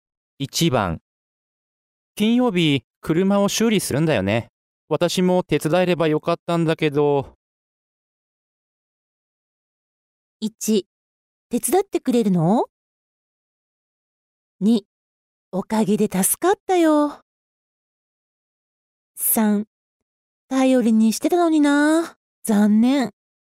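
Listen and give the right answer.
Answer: 3: 頼りにしてたのにな。残念。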